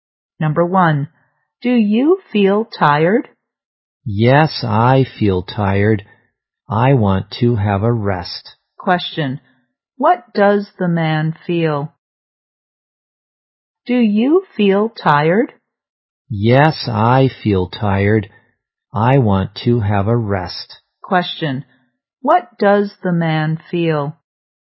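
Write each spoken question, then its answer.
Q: Question, what does the man feel?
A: Tired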